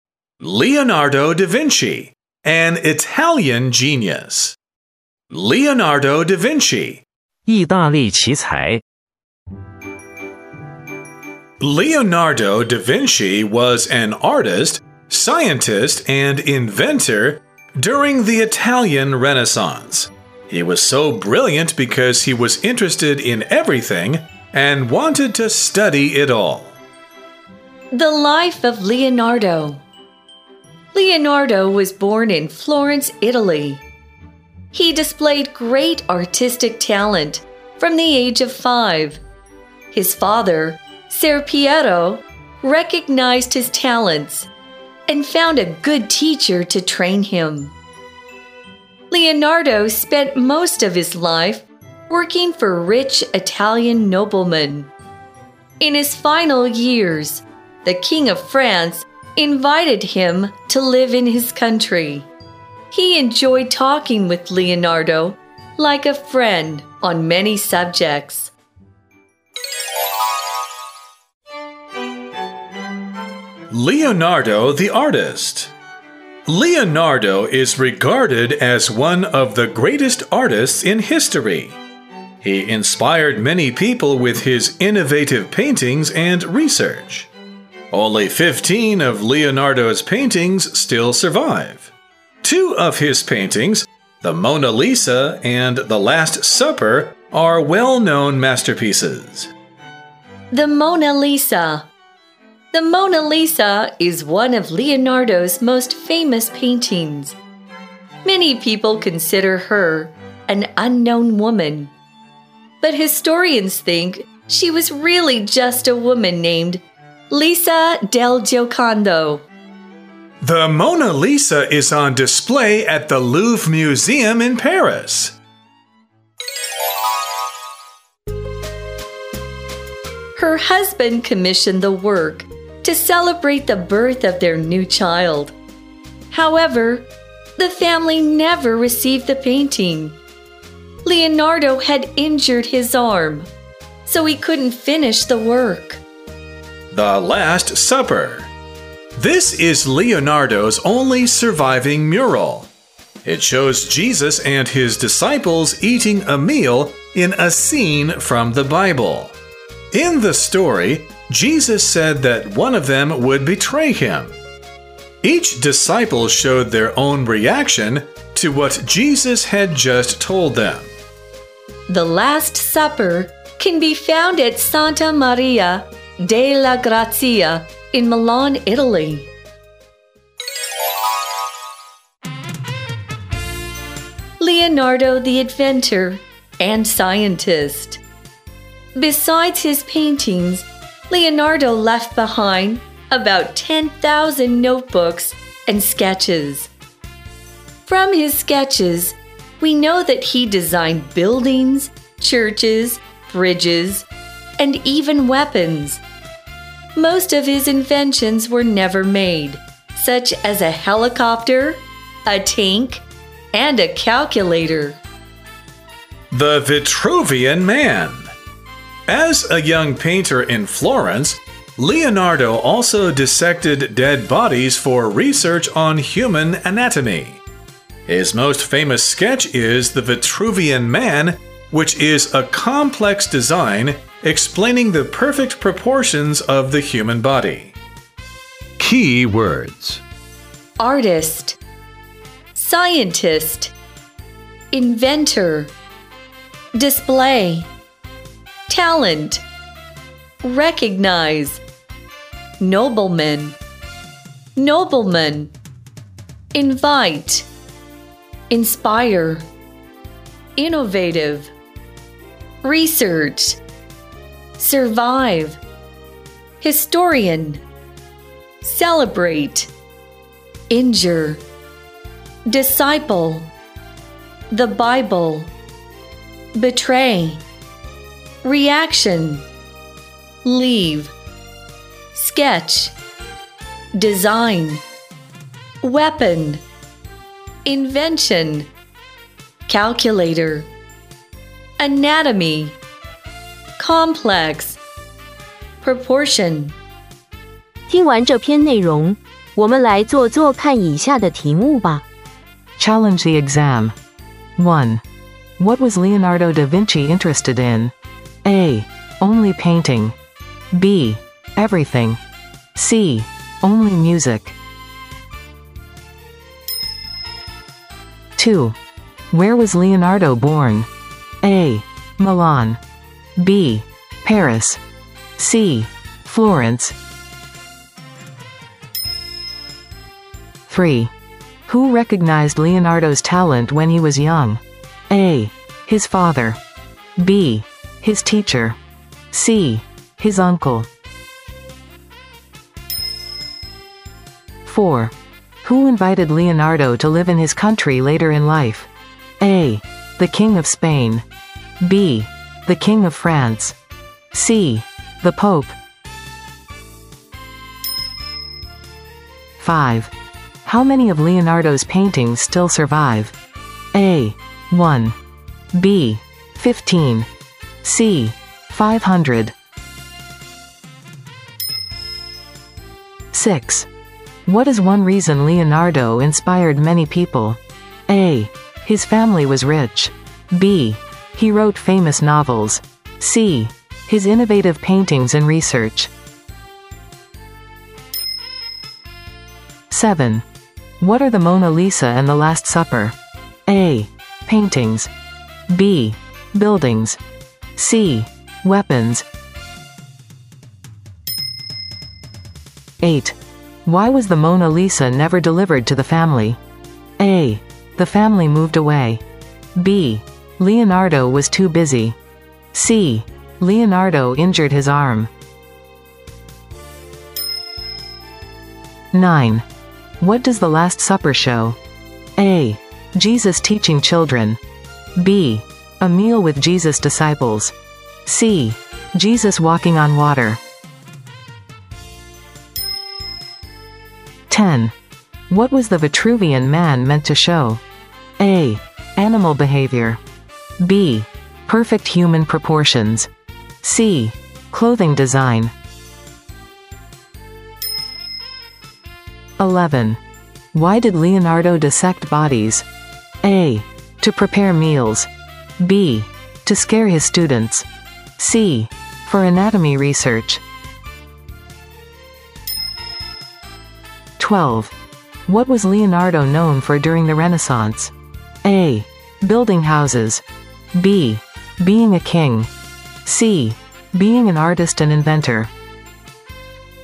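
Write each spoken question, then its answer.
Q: What was Leonardo da Vinci interested in?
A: B: Everything.

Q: Where was Leonardo born?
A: C: Florence.

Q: Who recognized Leonardo's talent when he was young?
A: A: His father.

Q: Who invited Leonardo to live in his country later in life?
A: B: The King of France.

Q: How many of Leonardo's paintings still survive?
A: B: 15.

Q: What is one reason Leonardo inspired many people?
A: C: His innovative paintings and research.

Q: What are the Mona Lisa and the Last Supper?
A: A: Paintings.

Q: Why was the Mona Lisa never delivered to the family?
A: C: Leonardo injured his arm.

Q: What does the Last Supper show?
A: B: A meal with Jesus' disciples.

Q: What was the Vitruvian man meant to show?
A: B: Perfect human proportions.

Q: Why did Leonardo dissect bodies?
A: C: For anatomy research.

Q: What was Leonardo known for during the Renaissance?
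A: C: Being an artist and inventor.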